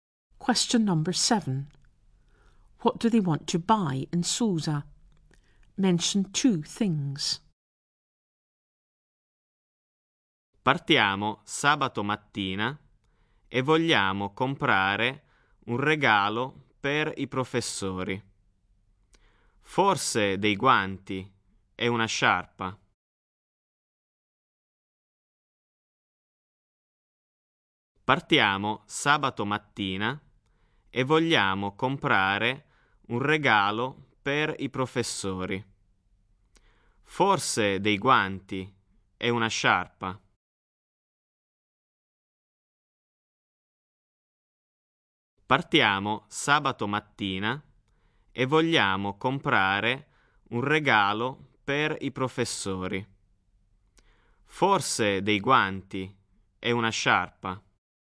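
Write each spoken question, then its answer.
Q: What do they want to buy in Susa?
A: Gloves and a scarf (a present for the teachers)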